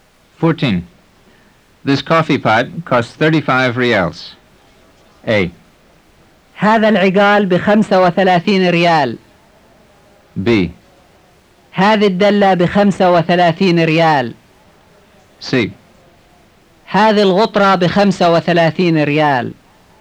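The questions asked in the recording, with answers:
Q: This coffee pot costs 35 reals.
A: B: هذه الدلة بخمسة وثلاثين ريال.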